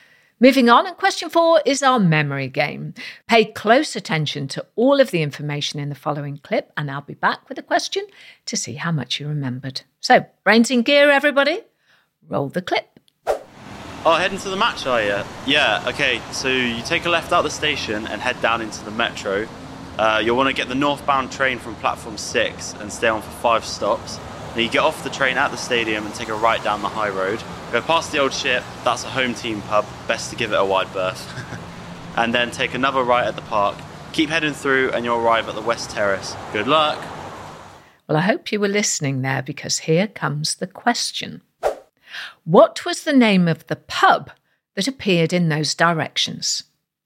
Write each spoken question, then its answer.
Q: What was the name of the pub that appeared in those directions?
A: The answer was the Old Ship.